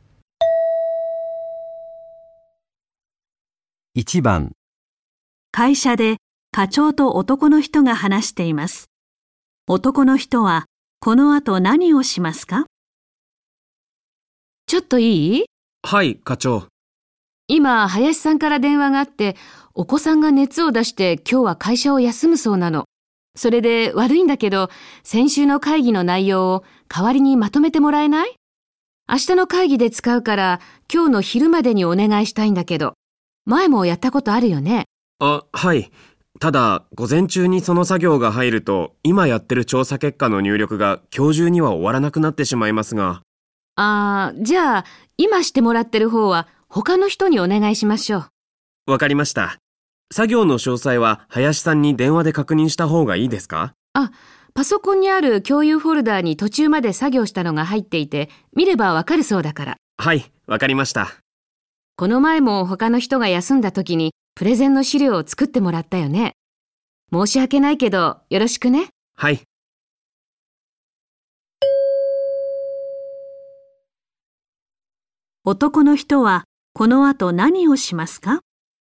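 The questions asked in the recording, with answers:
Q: 男の人はこの後何をしますか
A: 先週の会議の内容をまとめる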